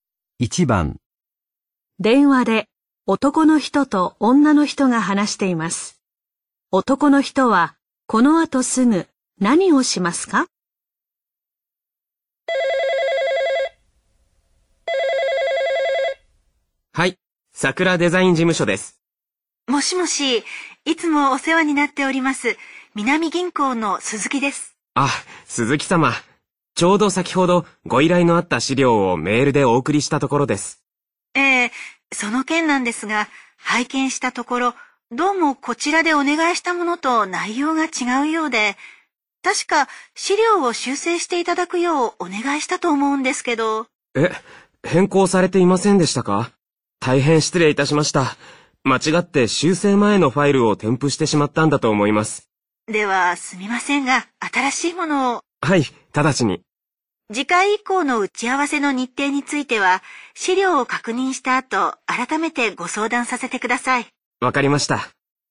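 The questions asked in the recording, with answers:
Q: 男の人は、この後すぐ何をしますか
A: 修正した新しい資料をメールで送る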